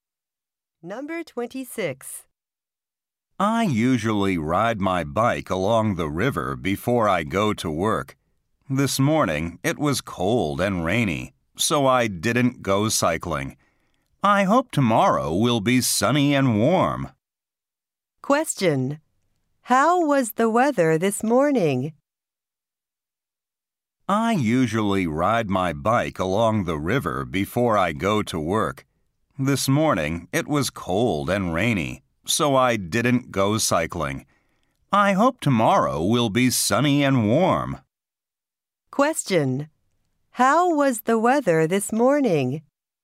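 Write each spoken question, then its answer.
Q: How was the weather this morning?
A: Cold and rainy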